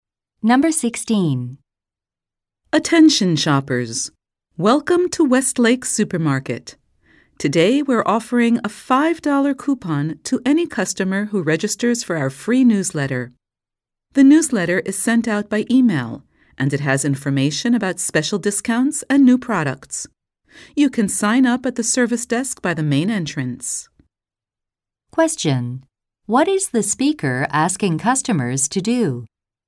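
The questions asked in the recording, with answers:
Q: What is the speaker asking customers to do?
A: Sign up for the free newsletter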